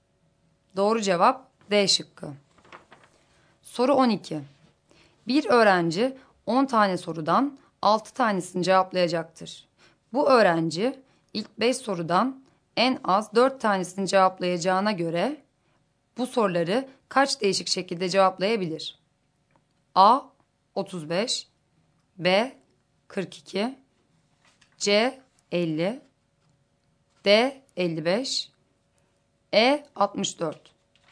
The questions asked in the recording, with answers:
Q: Bu öğrenci ilk 5 sorudan en az 4 tanesini cevaplayacağına göre bu soruları kaç değişik şekilde cevaplayabilir?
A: Doğru cevap D şıkkı.